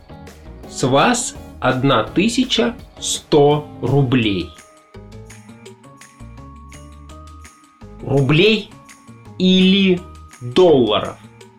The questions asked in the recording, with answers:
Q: Рублей или долларов?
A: Рублей. 1100 рублей.